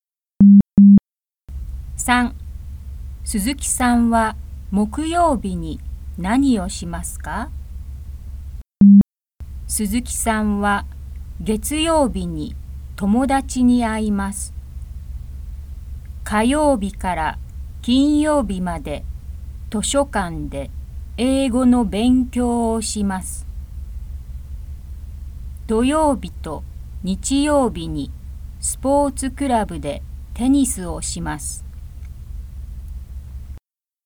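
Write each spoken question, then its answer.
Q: 鈴木さんは木曜日に何をしますか?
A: 図書館で英語の勉強をします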